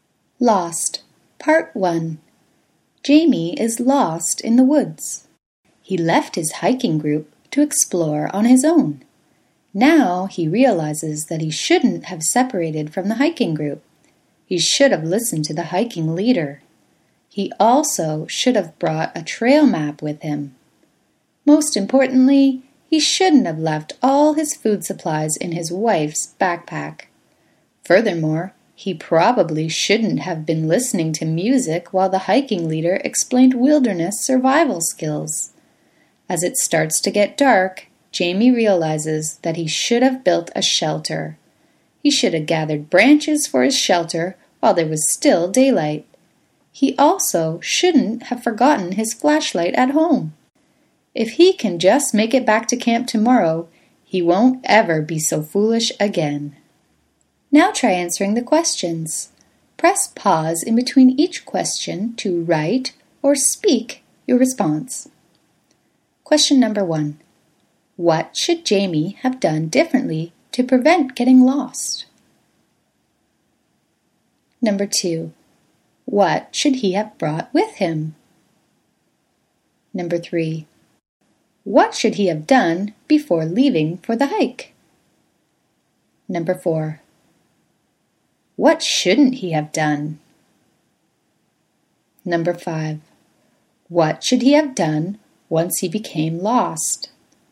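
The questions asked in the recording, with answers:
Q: What should Jamie have done differently to prevent getting lost?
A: He shouldn't have separated from the hiking group; he should have listened to the hiking leader.

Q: What should he have brought with him?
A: A trail map (and his flashlight).

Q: What should he have done once he became lost?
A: He should have built a shelter and gathered branches while it was still light.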